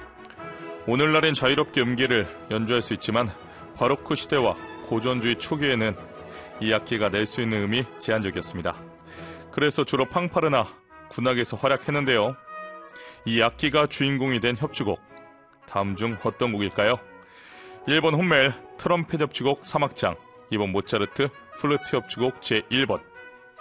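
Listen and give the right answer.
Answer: 1번: 훗멜 트럼펫 협주곡 3악장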